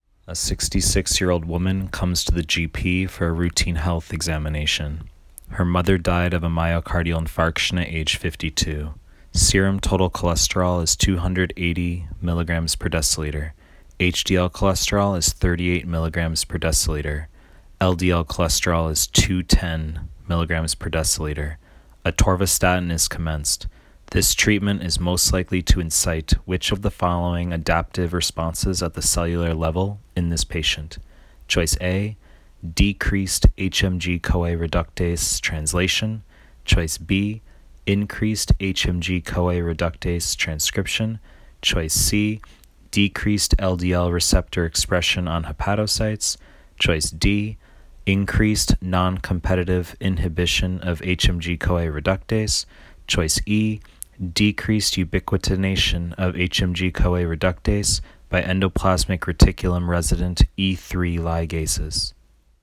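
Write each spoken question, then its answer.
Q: This treatment is most likely to incite which of the following adaptive responses at the cellular level in this patient?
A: B: increased HMG-CoA reductase transcription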